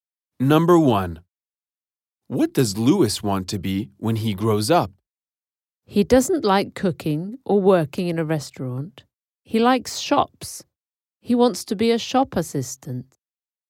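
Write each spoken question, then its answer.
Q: What does Lewis want to be when he grows up?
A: A shop assistant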